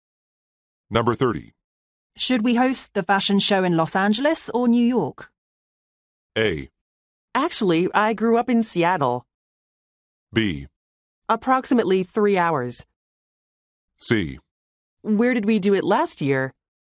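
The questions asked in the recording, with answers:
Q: Should we host the fashion show in Los Angeles or New York?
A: C: Where did we do it last year?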